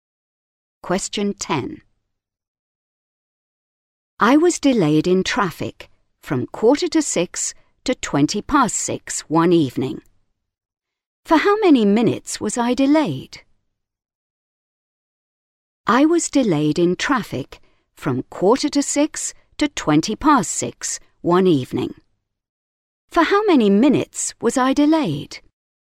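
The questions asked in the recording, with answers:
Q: For how many minutes was I delayed?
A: 35 minutes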